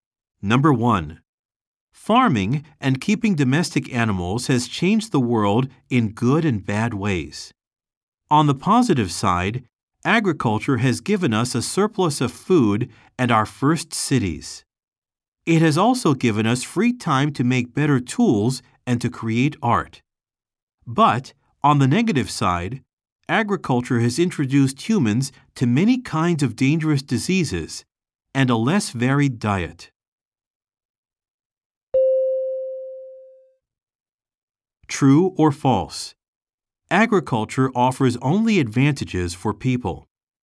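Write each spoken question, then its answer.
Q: True or false? Agriculture offers only advantages for people.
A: False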